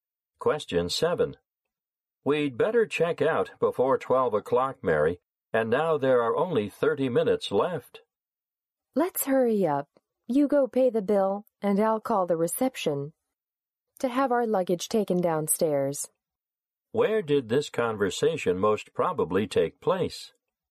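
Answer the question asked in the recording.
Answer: In a hotel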